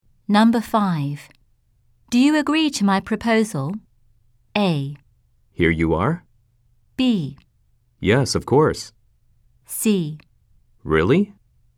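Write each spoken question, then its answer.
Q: Do you agree to my proposal?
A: B: Yes, of course.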